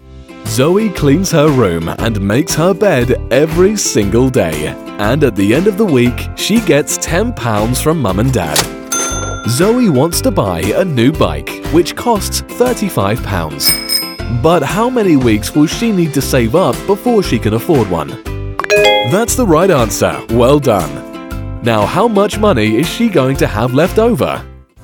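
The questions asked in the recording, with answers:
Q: But how many weeks will she need to save up before she can afford one?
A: 4 weeks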